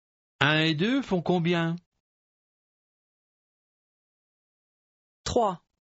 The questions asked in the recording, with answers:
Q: Un et deux font combien?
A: Trois.